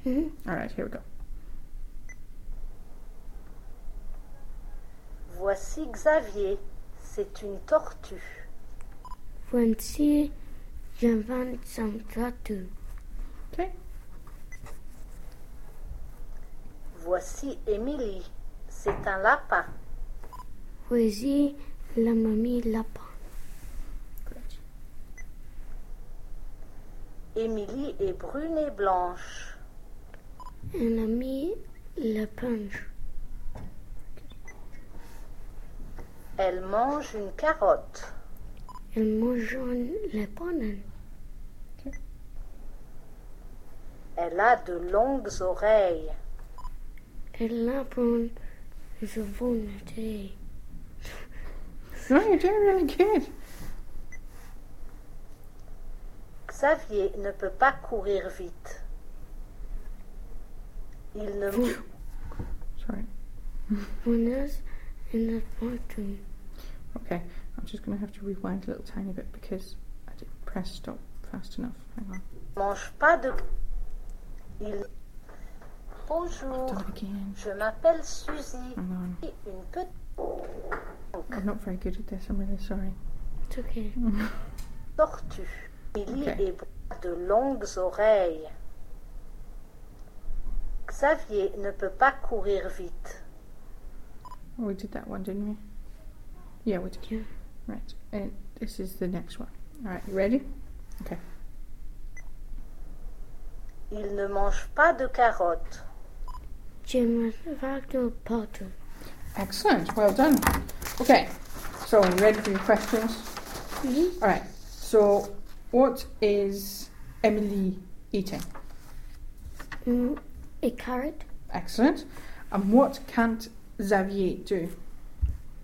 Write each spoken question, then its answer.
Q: So, what is Emily eating?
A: A carrot.

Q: And what can't Xavier do?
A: Run.